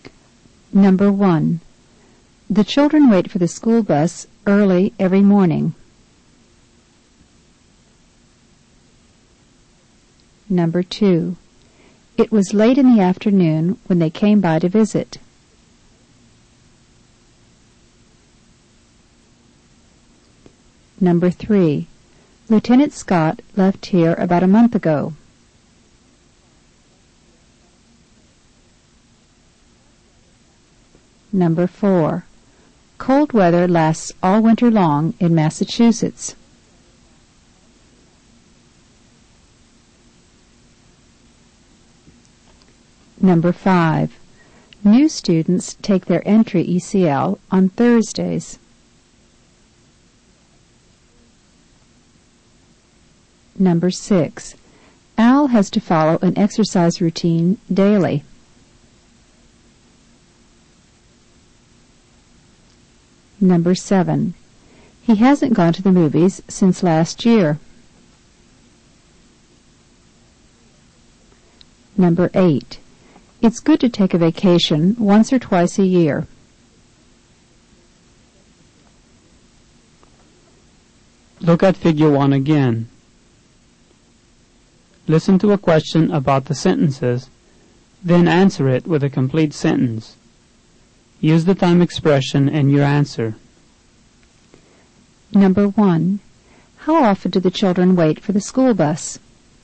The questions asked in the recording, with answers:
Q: How often do the children wait for the school bus?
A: They wait for it early every morning.